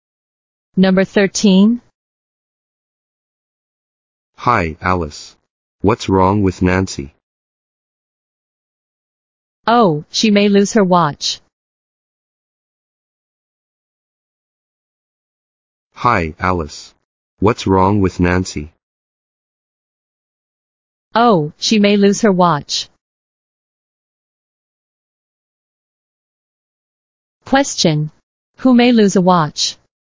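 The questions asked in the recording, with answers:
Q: Question. Who may lose a watch?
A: Nancy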